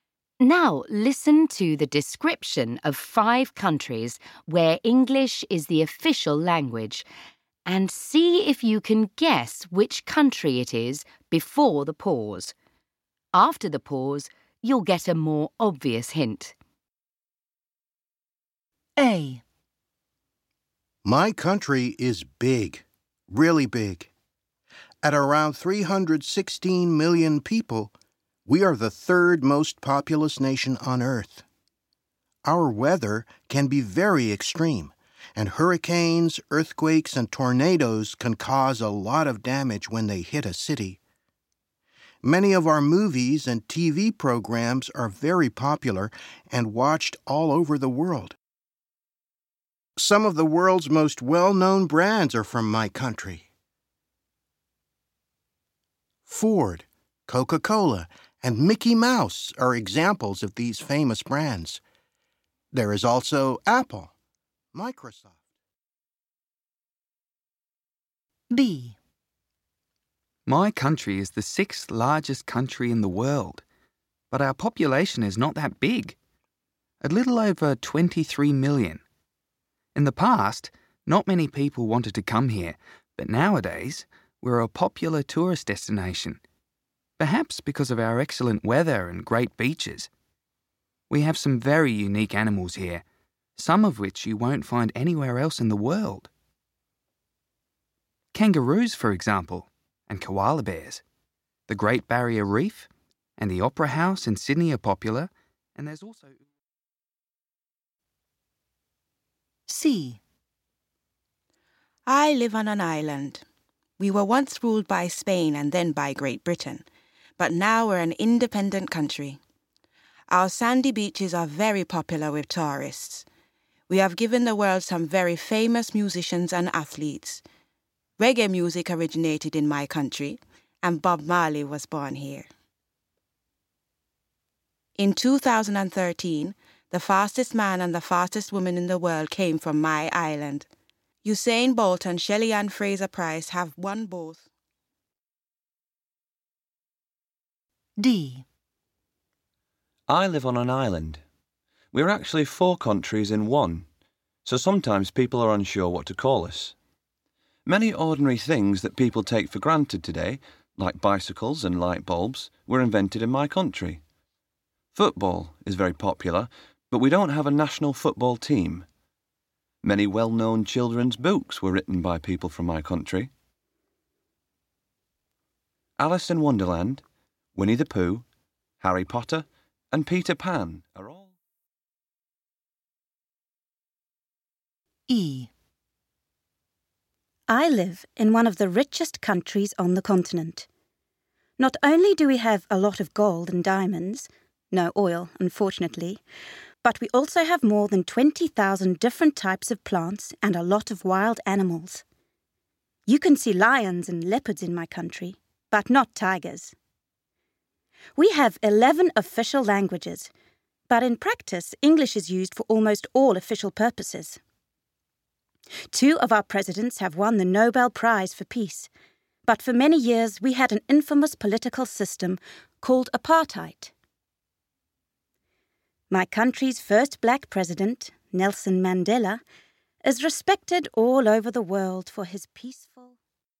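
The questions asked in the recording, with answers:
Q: see if you can guess which country it is before the pause.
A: the United States

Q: see if you can guess which country it is before the pause.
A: Australia

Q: see if you can guess which country it is before the pause.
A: Jamaica

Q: see if you can guess which country it is before the pause.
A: the United Kingdom

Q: see if you can guess which country it is before the pause.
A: South Africa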